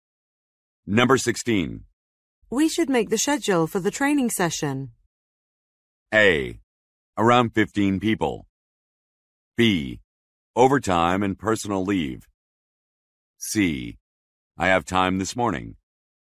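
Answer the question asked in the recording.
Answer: C: I have time this morning.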